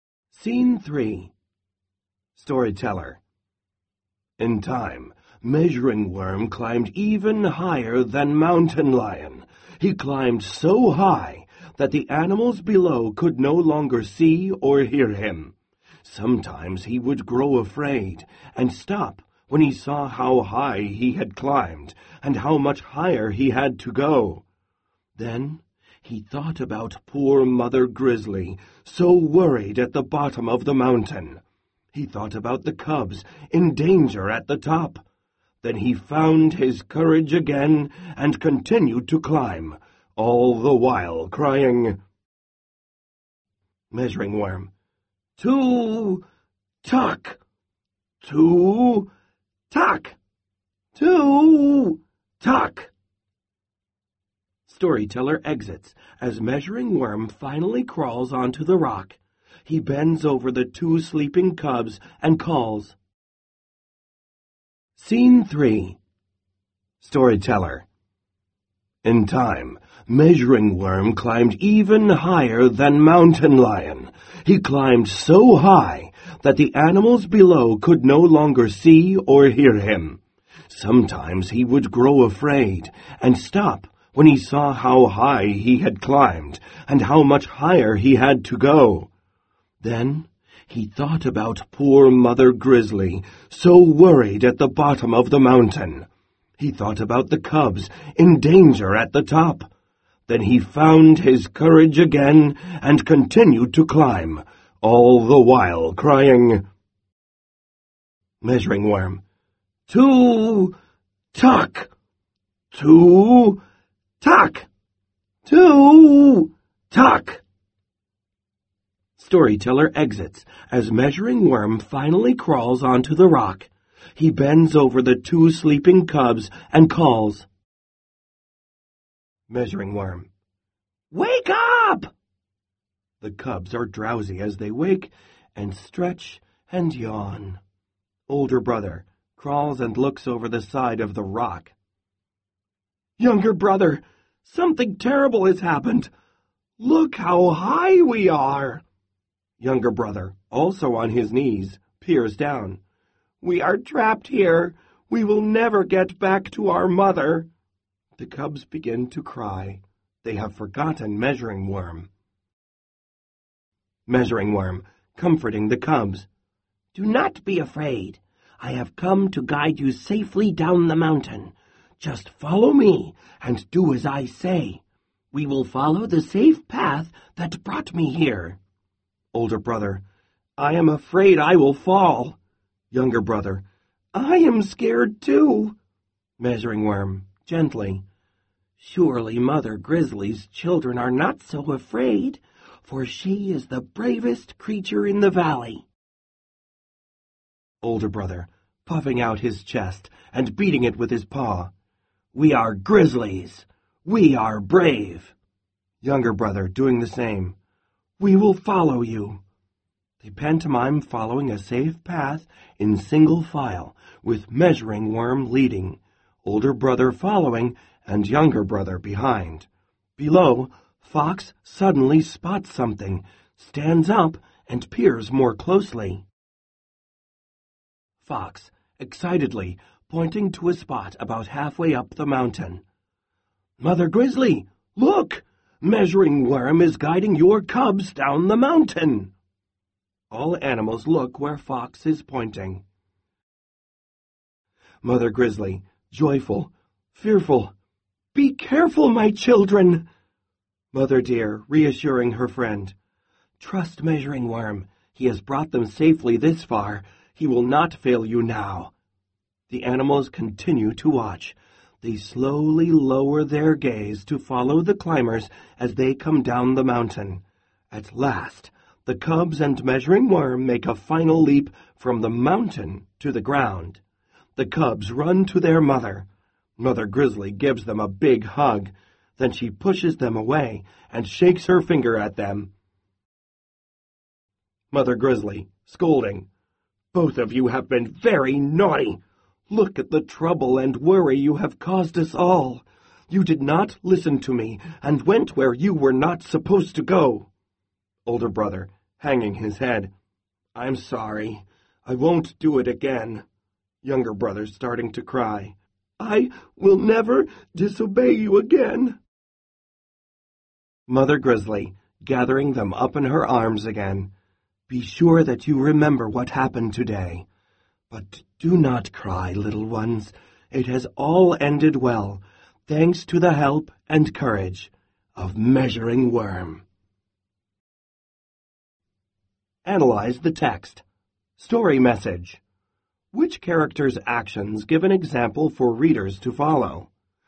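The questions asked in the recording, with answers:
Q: Which character's actions give an example for readers to follow?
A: Measuring Worm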